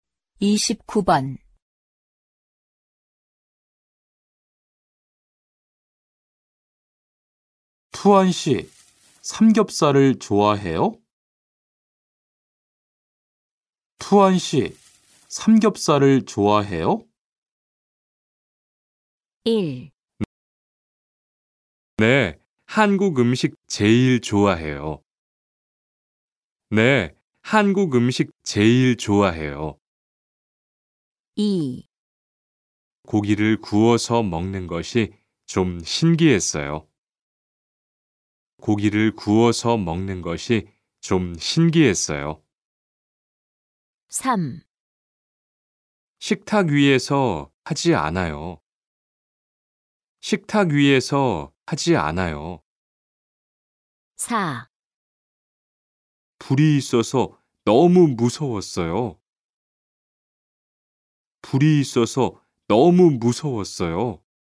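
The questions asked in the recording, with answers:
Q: 투안 씨, 삼겹살을 좋아해요?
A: 1: 네, 한국 음식 제일 좋아해요.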